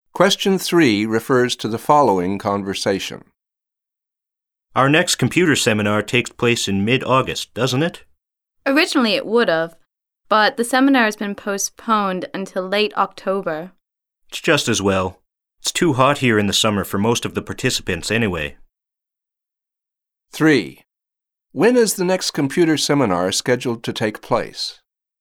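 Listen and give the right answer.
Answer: In late October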